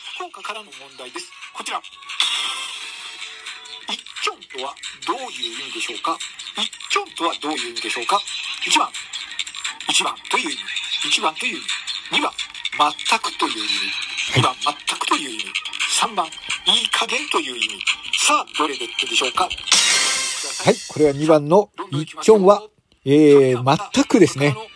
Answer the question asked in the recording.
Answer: これは2番の一ちょんはえー、全くですね。